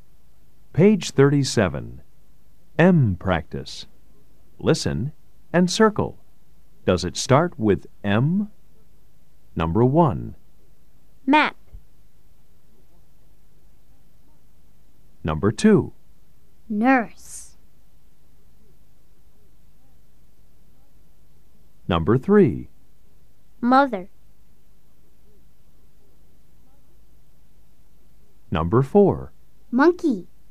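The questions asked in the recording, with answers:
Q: Nurse.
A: No

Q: Mother.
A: Yes

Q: Monkey.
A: Yes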